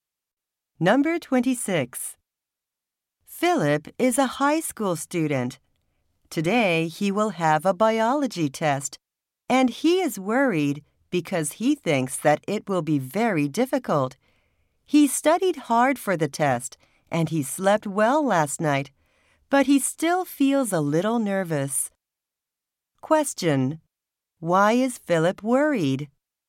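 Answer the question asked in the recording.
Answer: He thinks the biology test will be very difficult.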